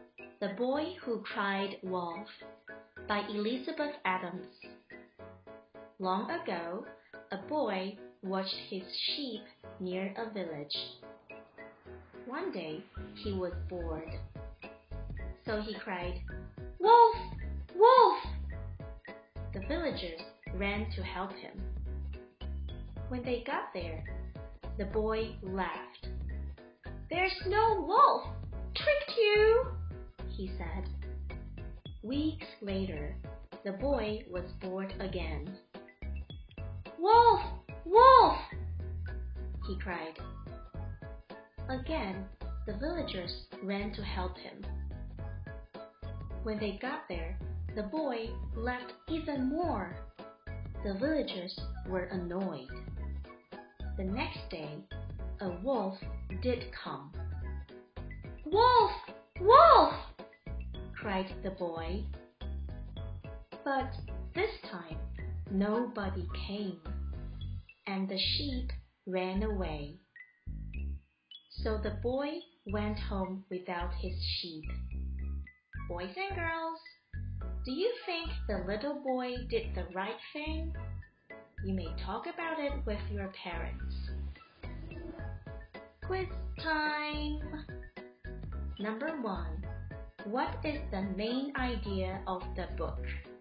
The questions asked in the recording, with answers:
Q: What is the main idea of the book?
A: The boy is always crying wolf when there is no wolf.